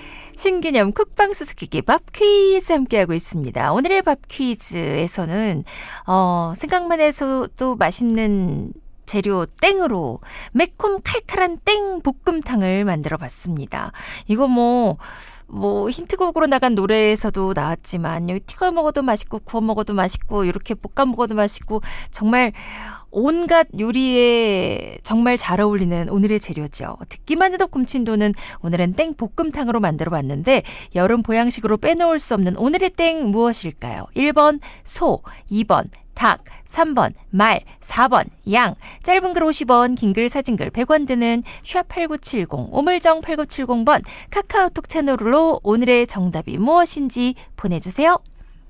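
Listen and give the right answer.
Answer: 2: 닭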